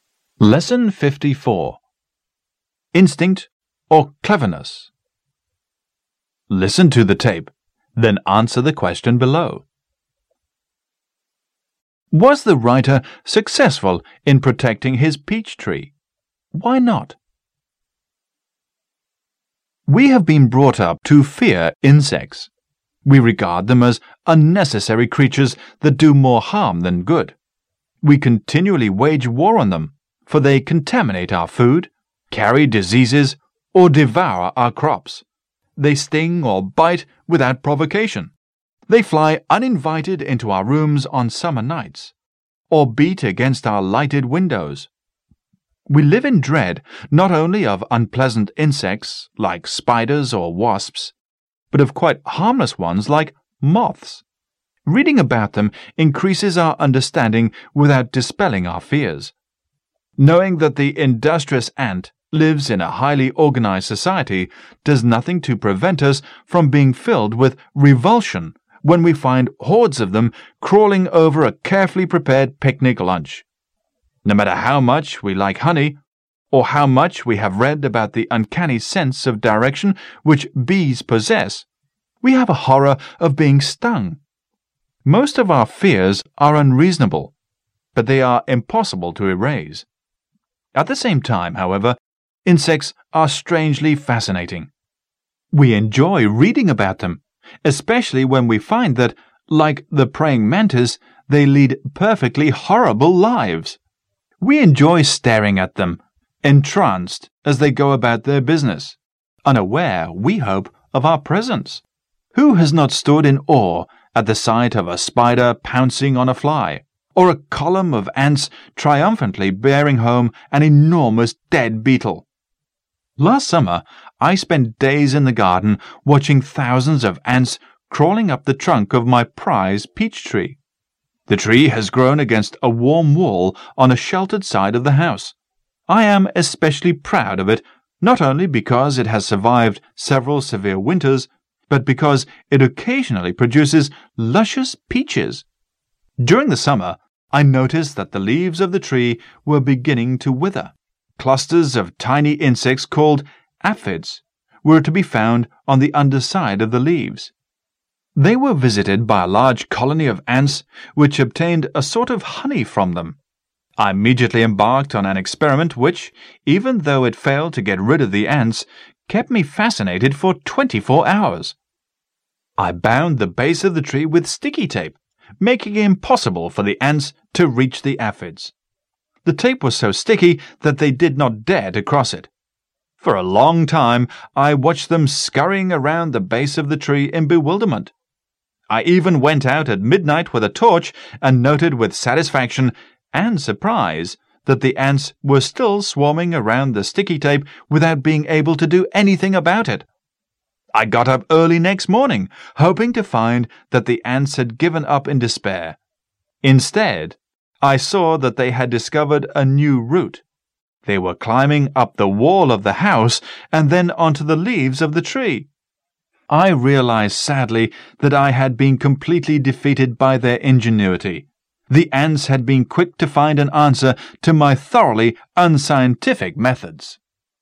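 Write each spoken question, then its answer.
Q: Was the writer successful in protecting his peach tree?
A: No

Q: Why not?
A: The ants found a new route, climbing up the house wall onto the tree's leaves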